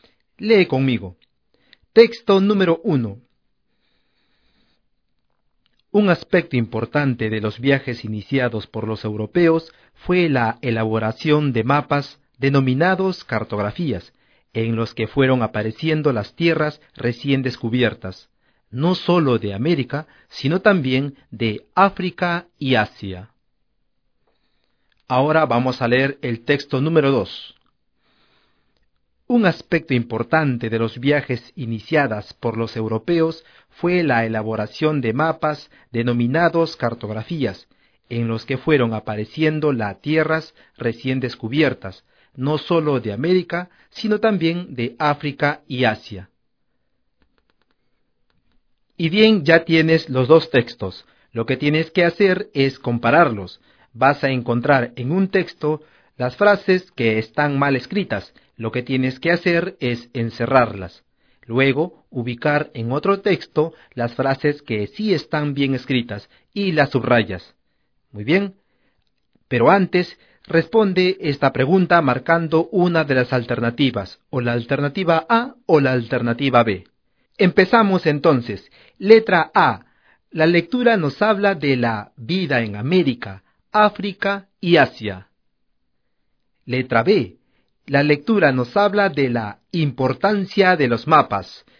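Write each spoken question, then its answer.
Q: Letra A. La lectura nos habla de la vida en América, África y Asia. Letra B. La lectura nos habla de la importancia de los mapas.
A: B: La lectura nos habla de la importancia de los mapas.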